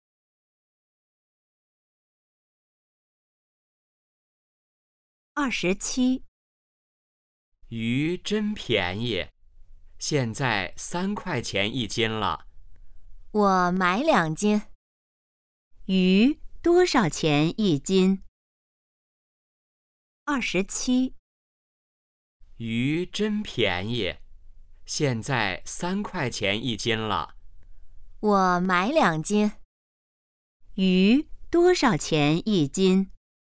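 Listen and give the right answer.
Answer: 3块钱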